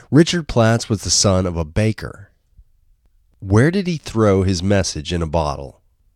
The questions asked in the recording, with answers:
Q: Where did he throw his message in a bottle?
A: He threw his message in a bottle into the Baltic Sea.